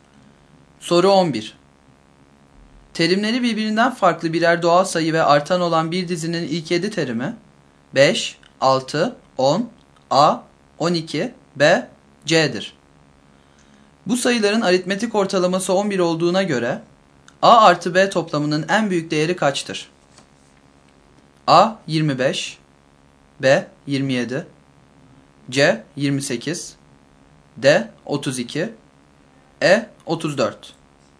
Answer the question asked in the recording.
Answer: Doğru yanıt B şıkkı.